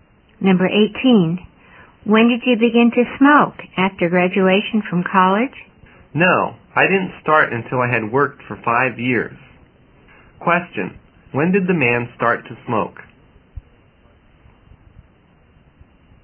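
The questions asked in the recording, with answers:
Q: when did the man start to smoke?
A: After he had worked for 5 years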